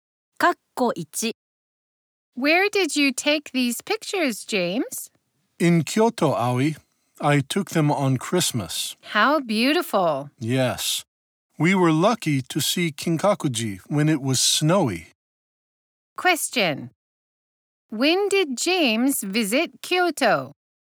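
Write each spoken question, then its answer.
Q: Question.When did James visit Kyoto?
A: On Christmas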